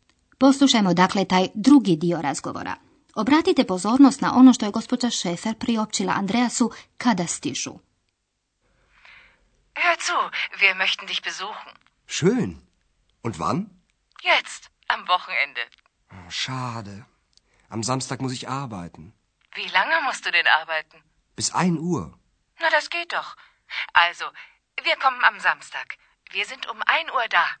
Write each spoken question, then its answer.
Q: Obratite pozornost na ono što je gospođa Šefer priopćila Andreasu kada stižu.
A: Gospođa Šefer kaže da dolaze u subotu u jedan